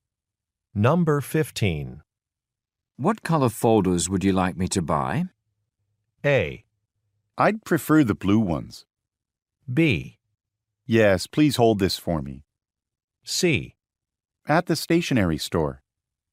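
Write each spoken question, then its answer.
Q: What color folders would you like me to buy?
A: A: I'd prefer the blue ones.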